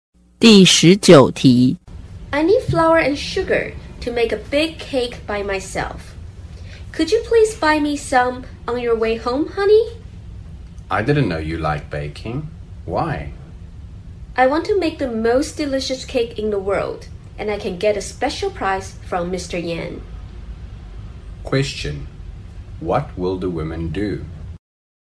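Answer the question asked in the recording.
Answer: Make a big cake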